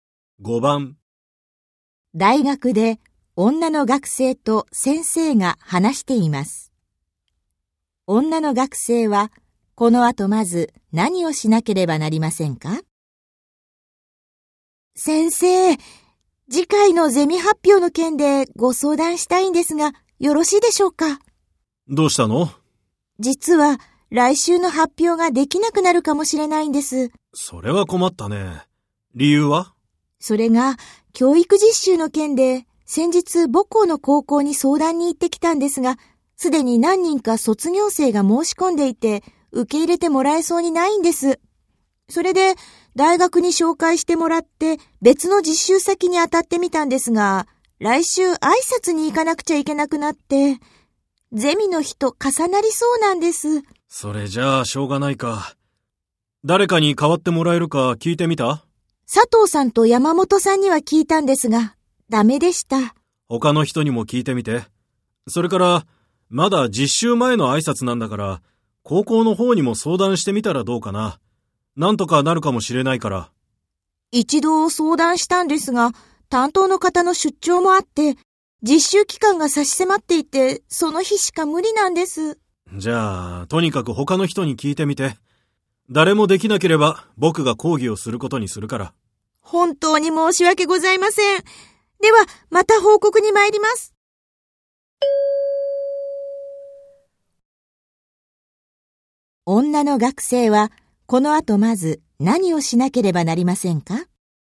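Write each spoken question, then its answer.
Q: 女の学生はこの後まず何をしなければなりませんか?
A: ほかのゼミの学生に発表を代わってもらえるか聞く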